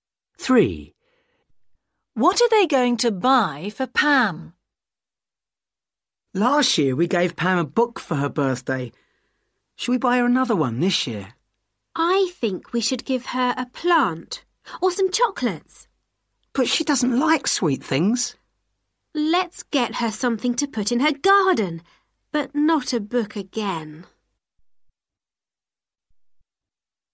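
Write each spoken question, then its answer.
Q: What are they going to buy for Pam?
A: A plant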